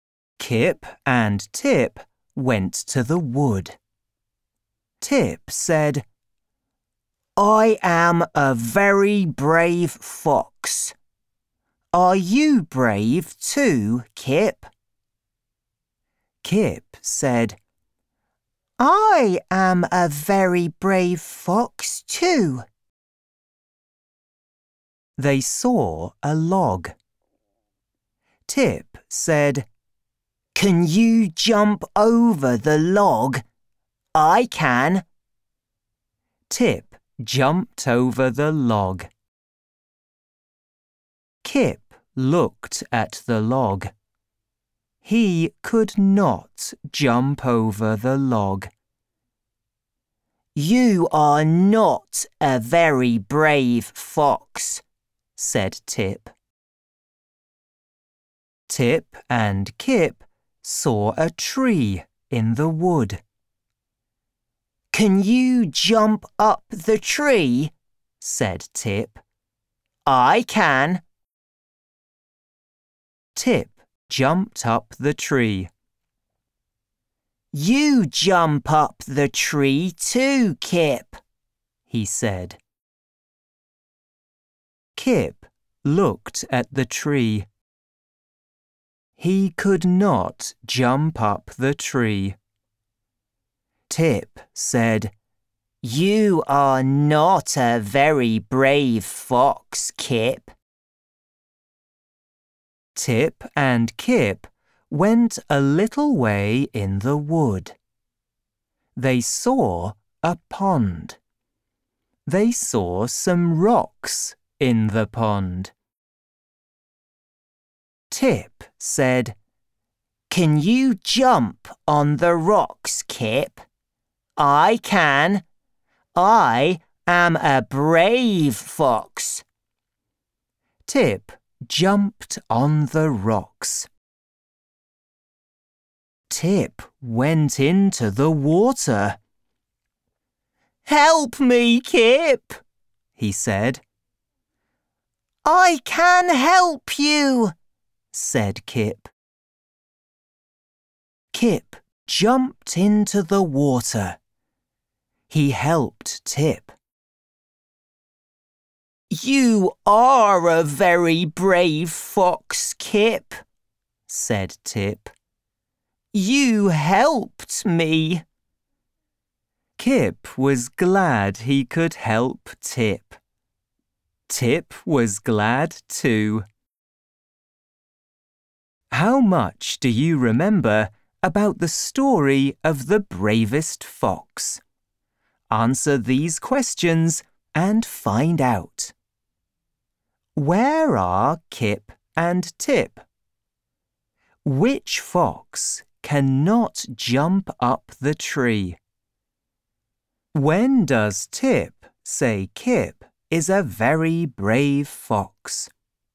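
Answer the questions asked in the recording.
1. In the wood
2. Kip
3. When Kip jumps into the water and helps him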